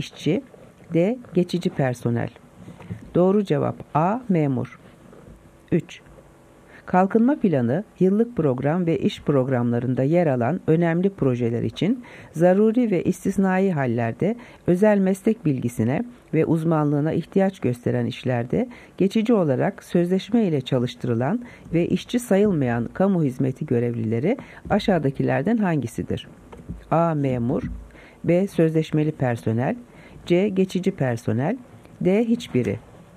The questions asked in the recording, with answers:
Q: Kalkınma planı, yıllık program ve iş programlarında yer alan önemli projeler için zaruri ve istisnai hallerde özel meslek bilgisine ve uzmanlığına ihtiyaç gösteren işlerde geçici olarak sözleşme ile çalıştırılan ve işçi sayılmayan kamu hizmeti görevlileri aşağıdakilerden hangisidir?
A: Doğru cevap B. Geçici personel.